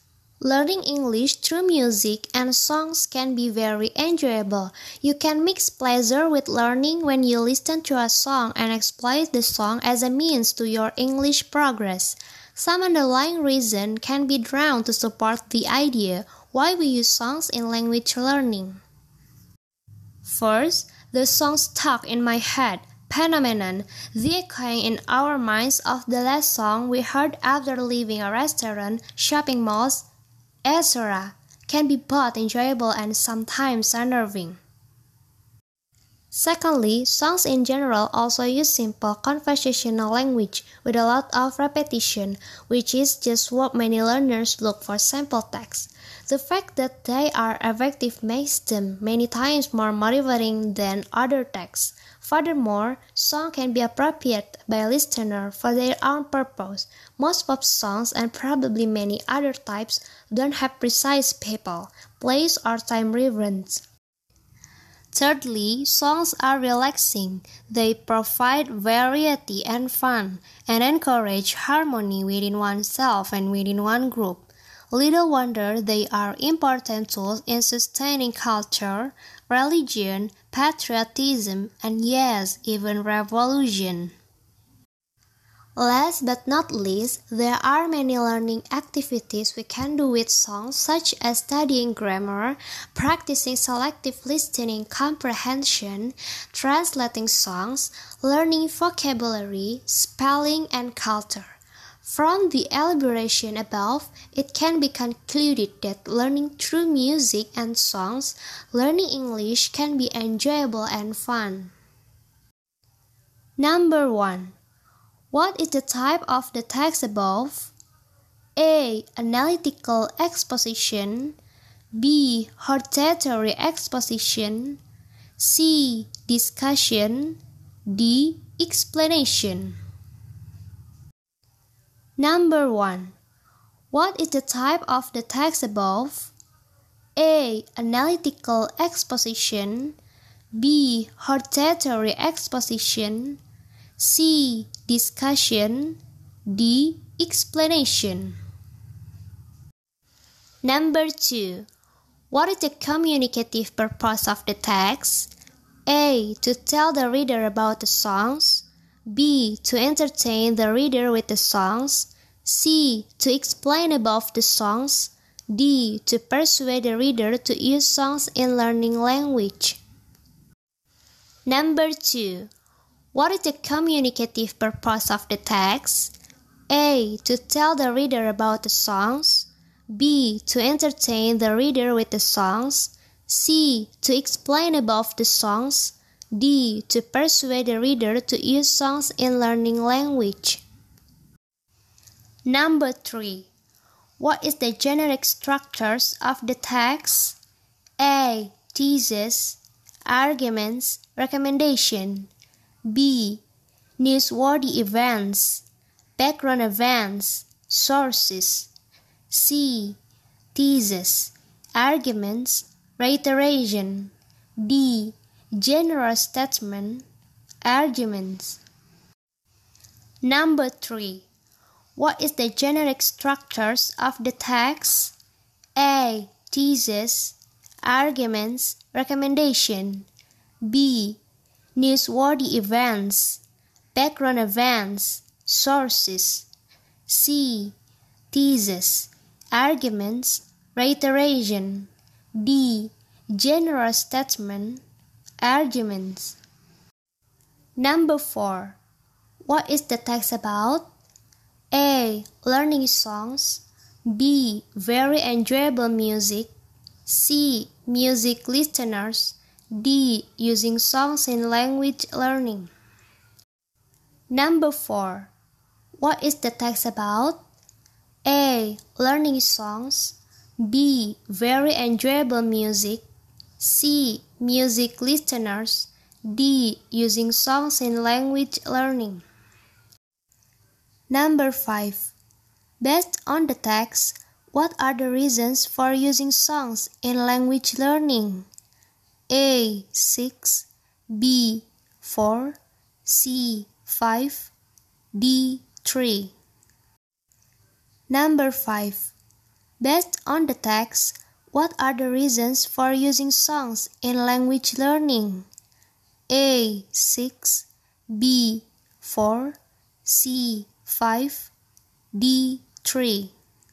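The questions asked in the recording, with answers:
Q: what is the type of the text above?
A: A: Analytical exposition.

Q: what is the communicative purpose of the text?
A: D: To persuade the reader to use songs in learning language.

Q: What is the generic structures of the text?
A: C: Thesis, arguments, reiteration.

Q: What is the text about?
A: D: Using songs in language learning.

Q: Based on the text, what are the reasons for using songs in language learning?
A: B: 4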